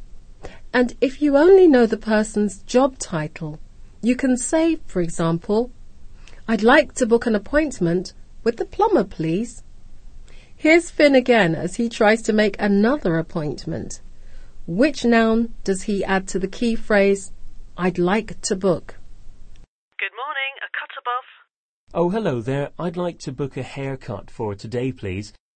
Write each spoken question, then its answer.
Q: Which noun does he add to the key phrase, I'd like to book?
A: Finn wants a haircut, so he simply says, I'd like to book a haircut.